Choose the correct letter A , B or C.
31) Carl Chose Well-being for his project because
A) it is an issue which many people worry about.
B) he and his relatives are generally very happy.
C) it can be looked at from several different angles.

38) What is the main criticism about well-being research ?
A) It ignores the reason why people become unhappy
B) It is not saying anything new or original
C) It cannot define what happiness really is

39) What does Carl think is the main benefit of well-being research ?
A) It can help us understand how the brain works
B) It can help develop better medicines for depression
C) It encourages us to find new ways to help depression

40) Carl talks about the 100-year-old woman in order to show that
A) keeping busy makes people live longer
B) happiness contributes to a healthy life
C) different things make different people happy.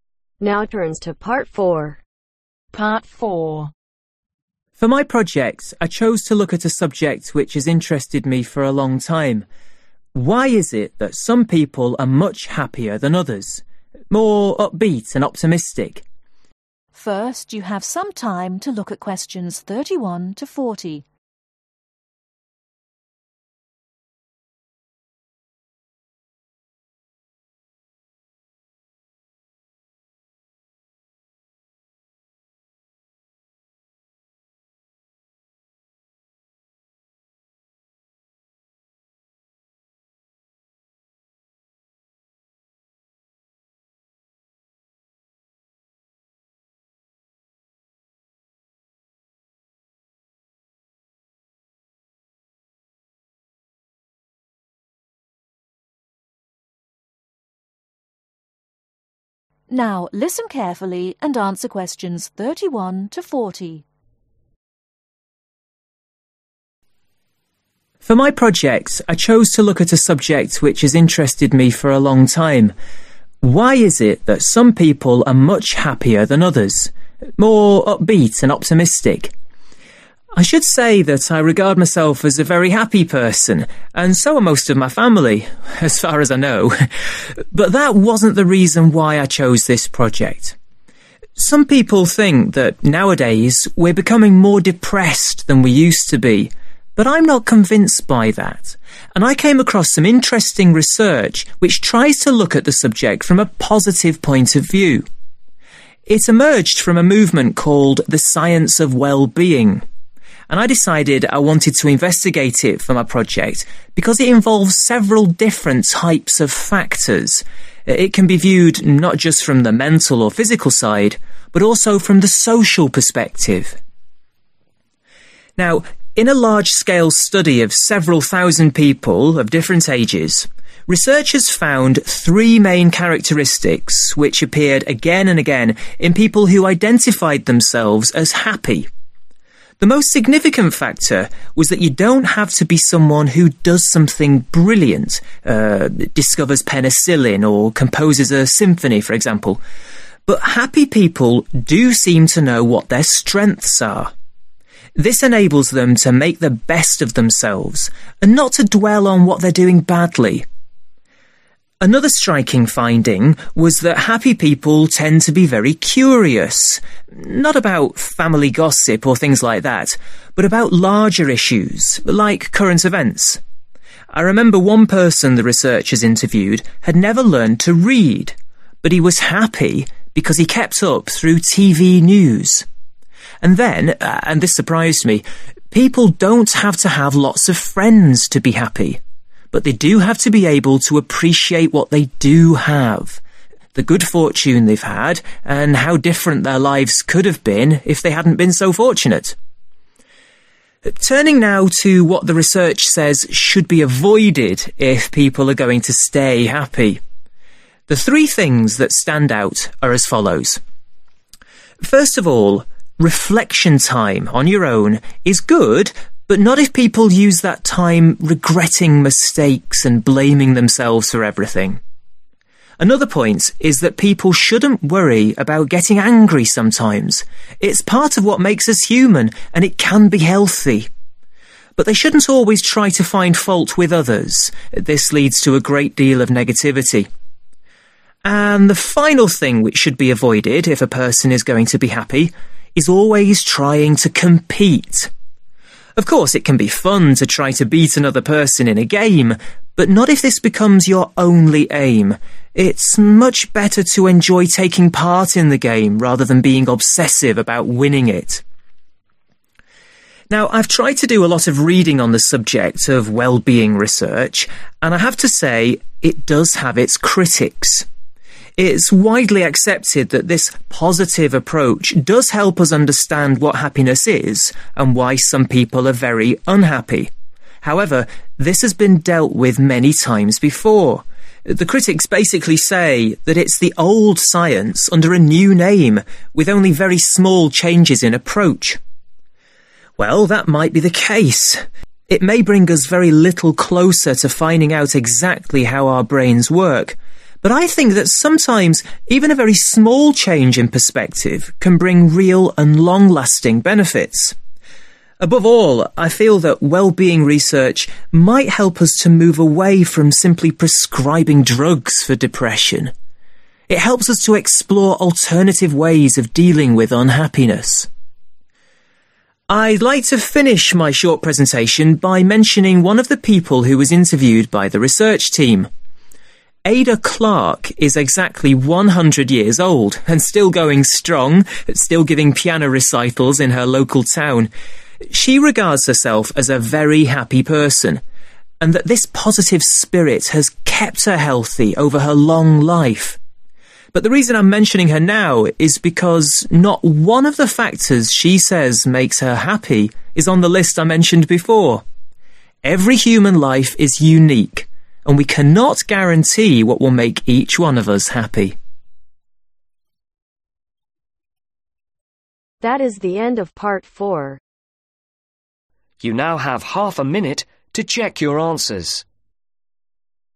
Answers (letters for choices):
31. C
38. B
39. C
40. C